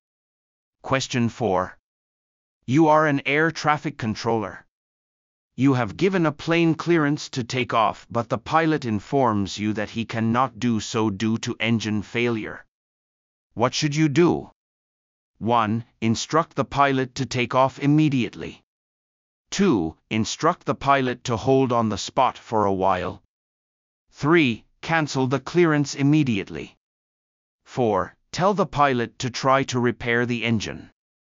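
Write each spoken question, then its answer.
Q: What should you do?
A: 3: Cancel the clearance immediately.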